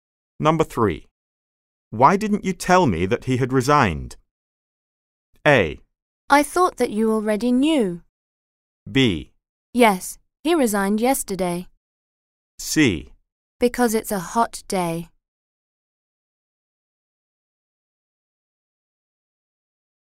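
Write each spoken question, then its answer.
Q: Why didn't you tell me that he had resigned?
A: A: I thought that you already knew.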